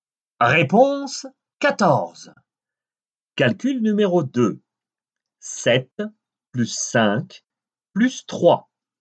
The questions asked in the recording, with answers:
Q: 7 plus 5 plus 3.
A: Quinze.